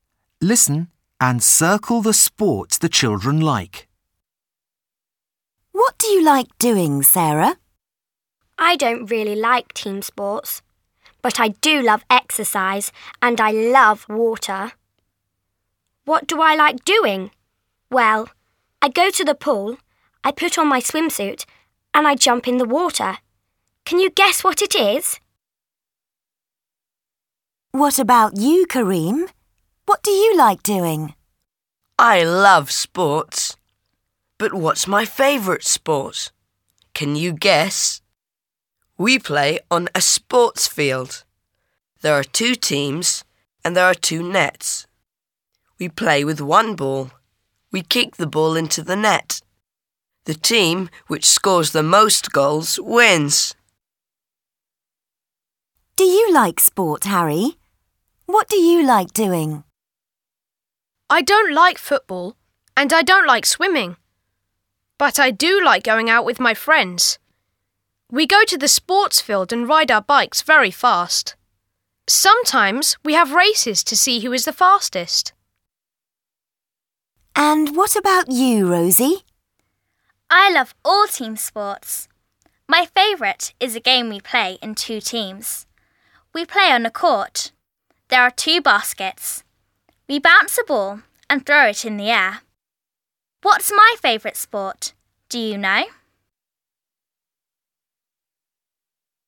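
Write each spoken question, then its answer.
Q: Can you guess what it is?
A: swimming

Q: Can you guess?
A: football

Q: What do you like doing?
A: riding bikes (cycling)

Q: What's my favourite sport? Do you know?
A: basketball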